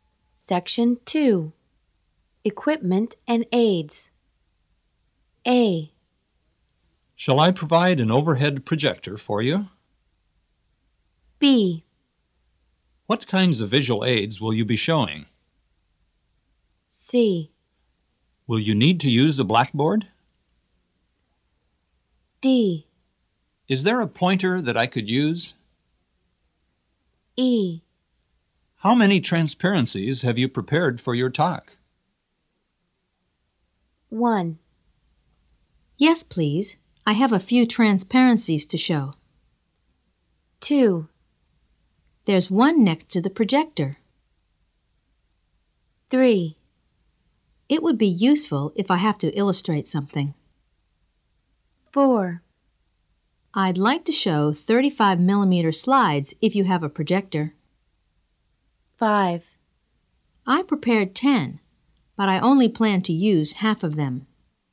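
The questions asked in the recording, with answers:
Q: Yes, please. I have a few transparencies to show.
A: A: Shall I provide an overhead projector for you?

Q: There's one next to the projector.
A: D: Is there a pointer that I could use?

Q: It would be useful if I have to illustrate something.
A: C: Will you need to use a blackboard?

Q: I'd like to show 35mm slides if you have a projector.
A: B: What kinds of visual aids will you be showing?

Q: I prepared 10, but I only plan to use half of them.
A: E: How many transparencies have you prepared for your talk?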